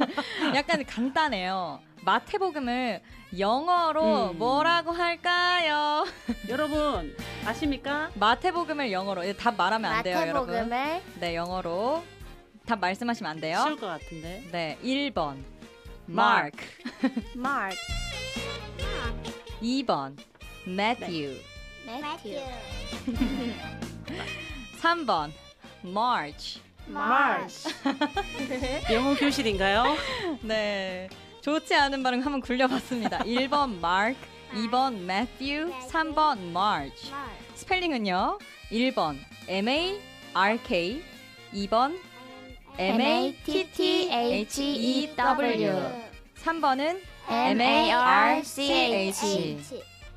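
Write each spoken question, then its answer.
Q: 마태복음을 영어로 뭐라고 할까요?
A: 2: Matthew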